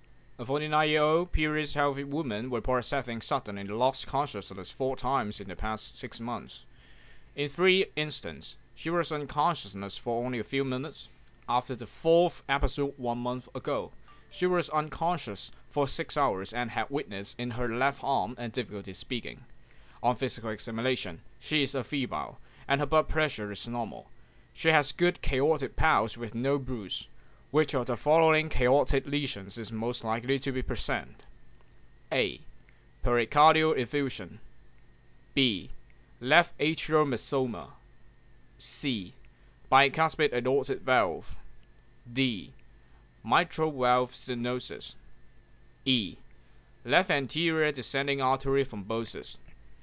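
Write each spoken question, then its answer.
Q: Which of the following chaotic lesions is most likely to be present?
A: B: Left atrial mesoma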